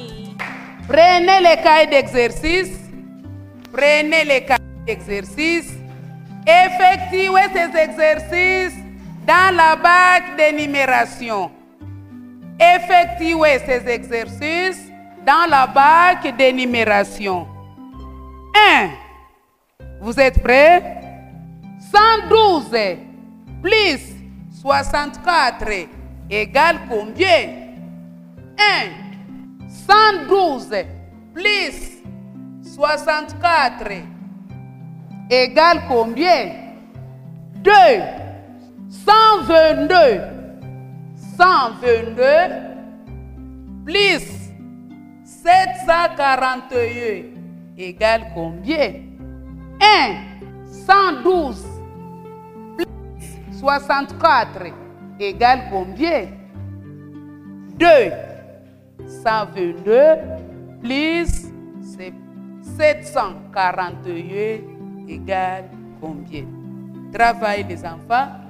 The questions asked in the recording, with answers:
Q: 112 plus 64 égale combien?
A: La réponse égale 176.

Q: 741 égale combien?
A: La réponse égale 863.